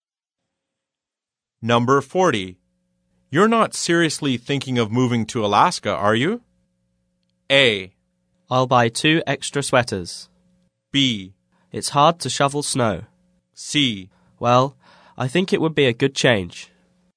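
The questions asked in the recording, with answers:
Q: You're not seriously thinking of moving to Alaska, are you?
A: C: Well, I think it would be a good change.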